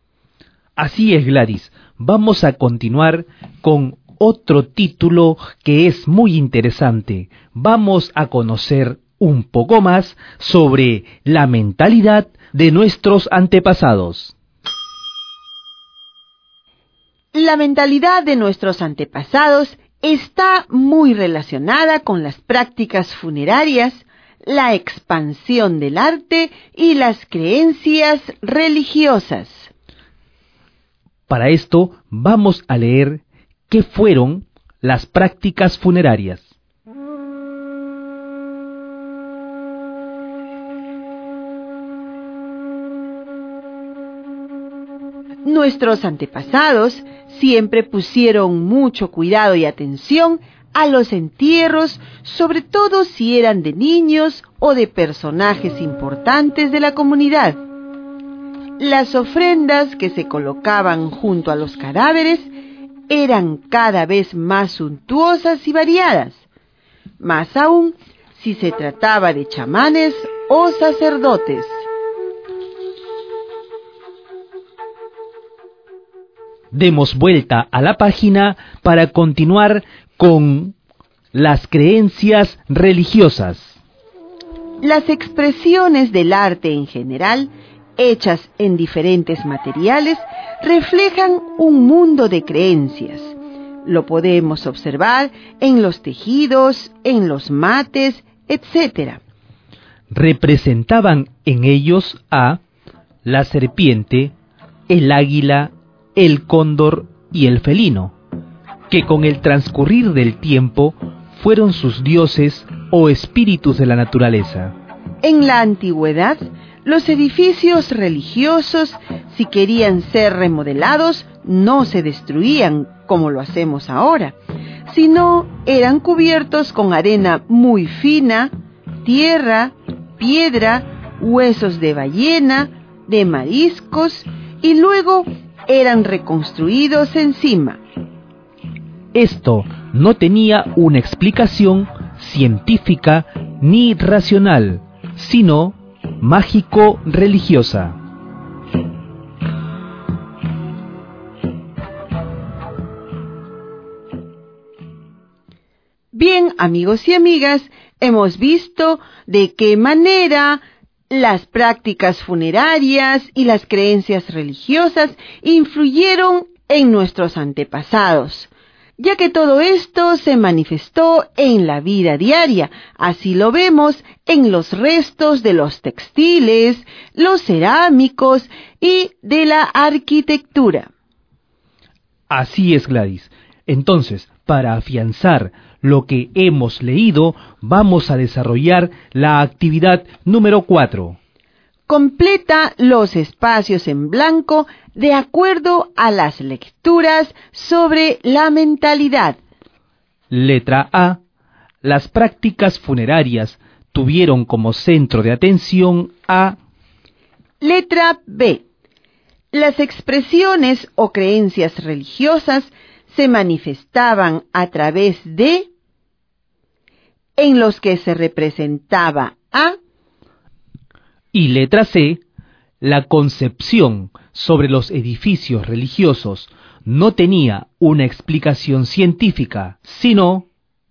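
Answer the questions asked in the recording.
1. los entierros de niños y personajes importantes
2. tejidos y mates; la serpiente, el águila, el cóndor y el felino
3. mágico-religiosa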